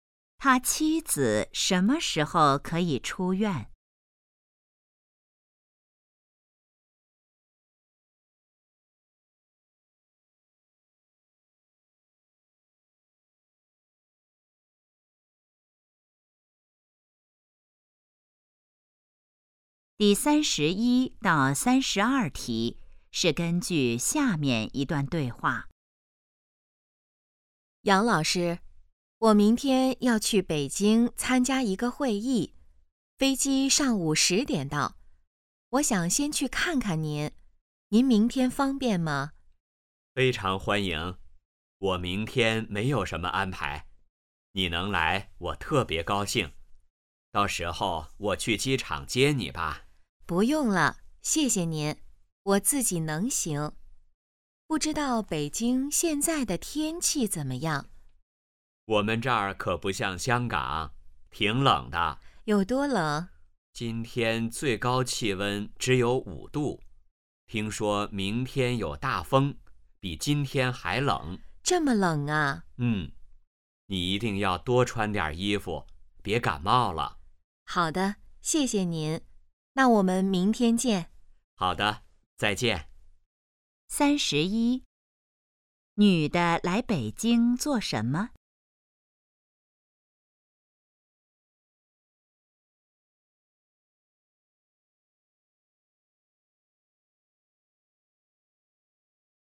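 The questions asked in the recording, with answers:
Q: 女的来北京做什么?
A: 参加会议

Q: 明天天气怎么样?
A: 有大风,比今天还冷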